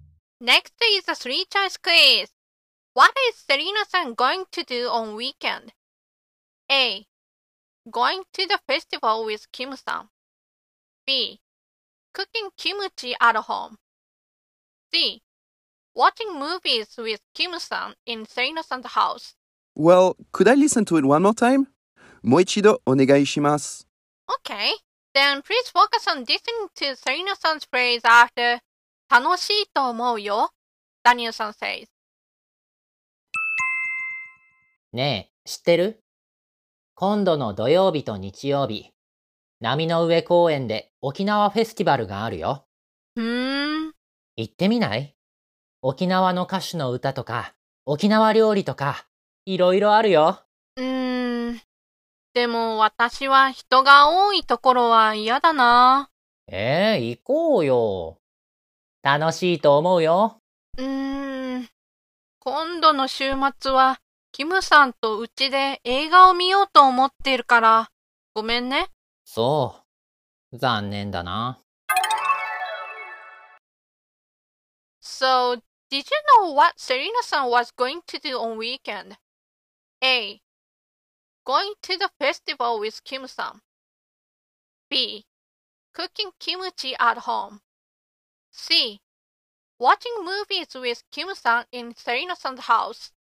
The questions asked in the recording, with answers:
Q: What is is san going to do on weekend?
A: so the answer must be C.